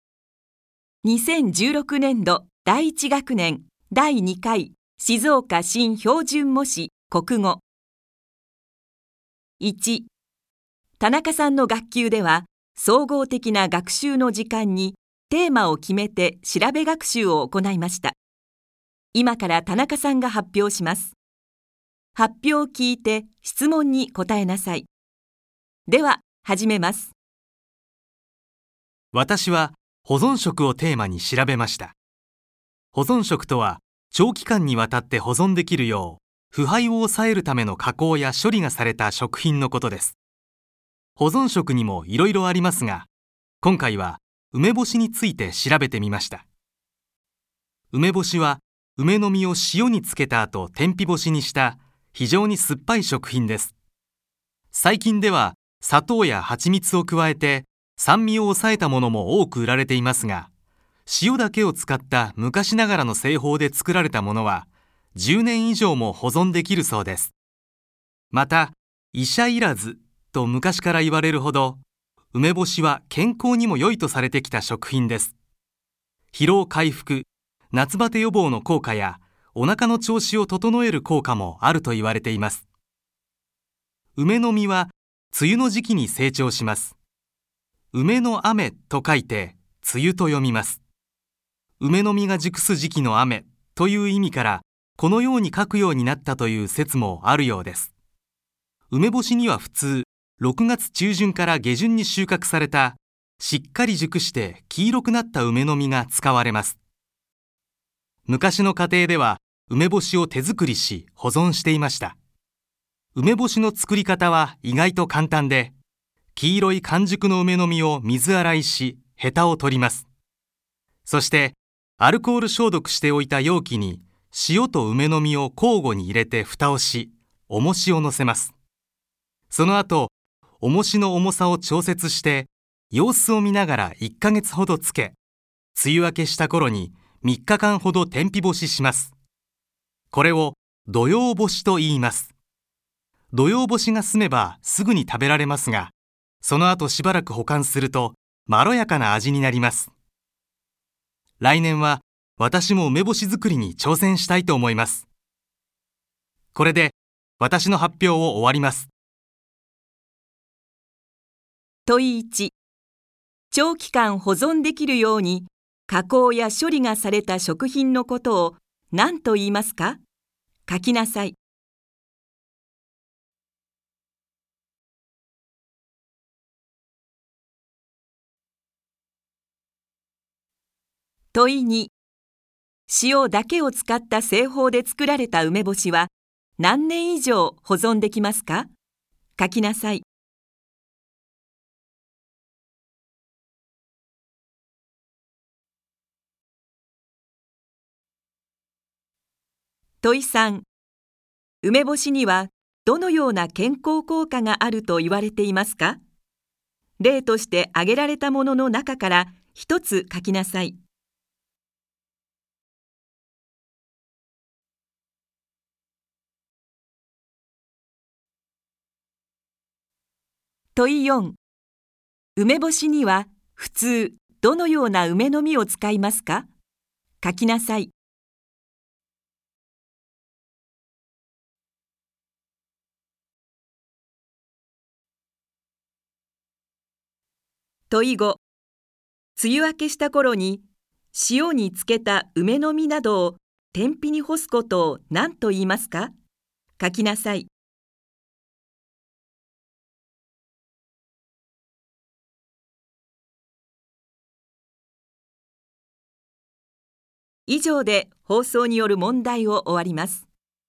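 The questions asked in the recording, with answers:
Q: 長期間保存できるように加工や処理がされた食品のことを何と言いますか?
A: 保存食

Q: 塩だけを使った製法で作られた梅干しは何年以上保存できますか?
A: 10年以上

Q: 梅干しにはどのような健康効果があると言われていますか?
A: 疲労回復(夏バテ予防、お腹の調子を整える効果)

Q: 梅干しには普通どのような梅の実を使いますか?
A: 6月中旬から下旬に収穫された、しっかり熟して黄色くなった梅の実

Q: 梅雨明けした頃に塩に漬けた梅の実などを天日に干すことを何と言いますか?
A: 土用干し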